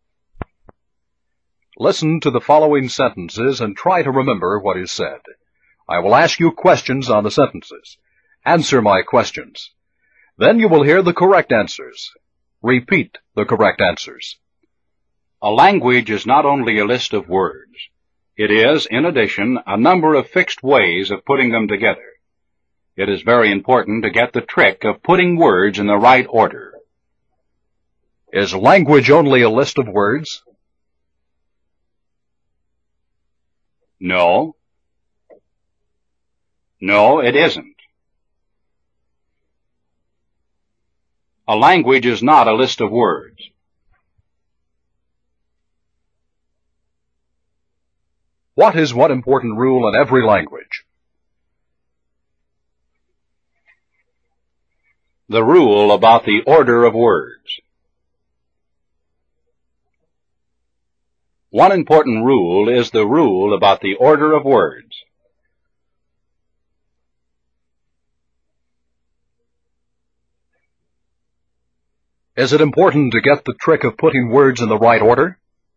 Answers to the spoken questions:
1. No. No, it isn't. A language is not a list of words.
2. The rule about the order of words.
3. Yes. Yes, it is. It is important to get the trick of putting words in the right order.